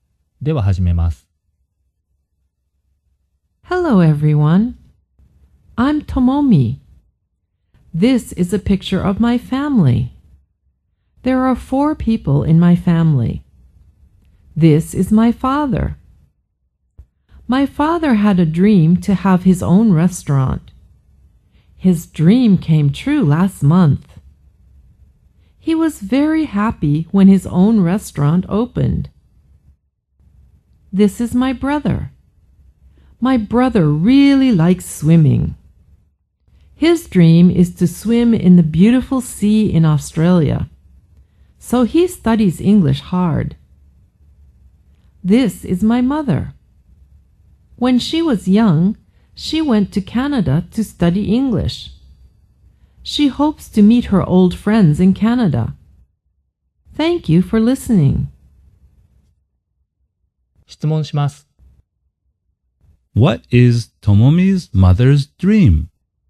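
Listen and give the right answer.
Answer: To meet her old friends in Canada.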